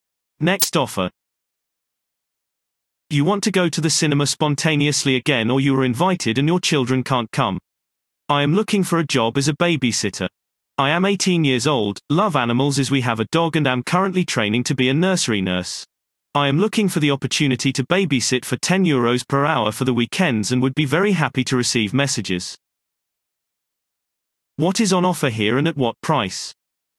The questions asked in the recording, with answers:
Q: What is on offer here and at what price?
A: Response. Childcare is offered at weekends for €10 per hour.